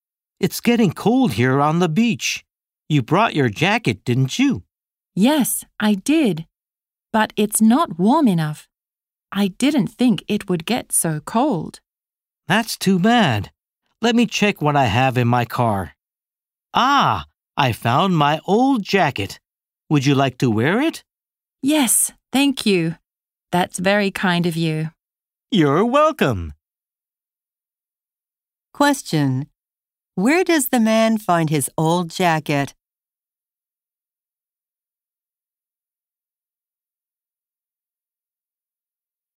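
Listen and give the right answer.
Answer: In his car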